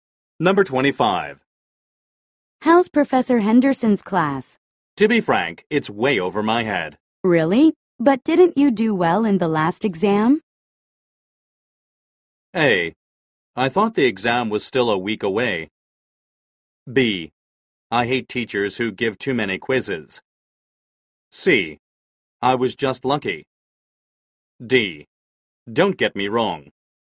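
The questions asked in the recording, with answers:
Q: Really? But didn't you do well in the last exam?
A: C: I was just lucky.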